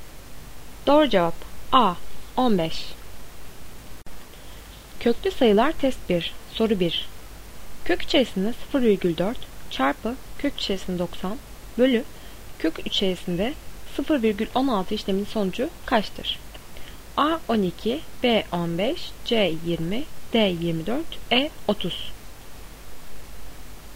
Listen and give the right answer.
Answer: Doğru cevap B 15.